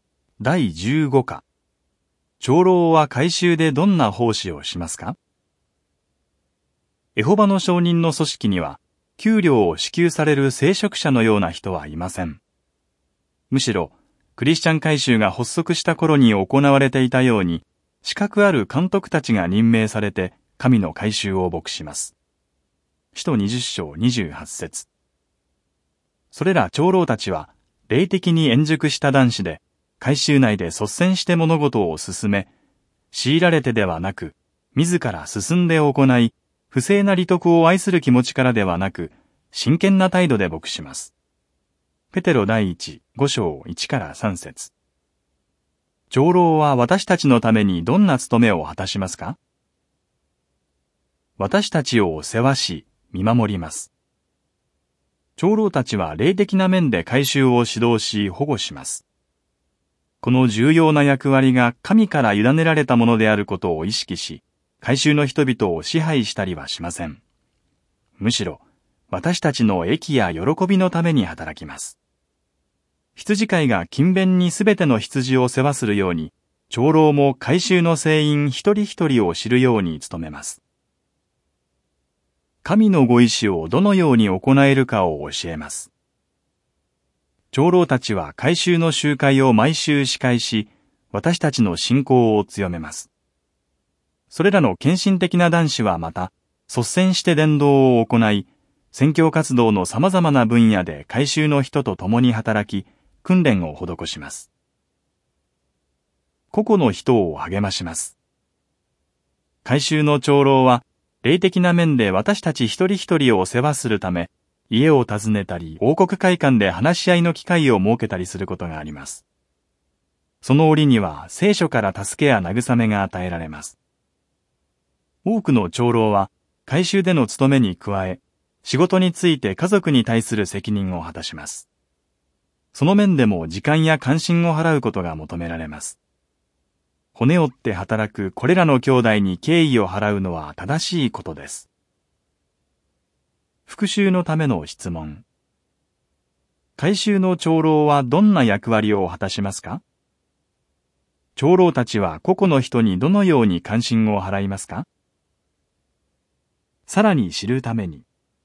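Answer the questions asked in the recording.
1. 霊的な面で会衆を指導し保護し、集会を司会し、伝道で率先して訓練を施す
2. 家を訪ねたり王国会館で話し合いの機会を設けたりして、聖書から助けや慰めを与える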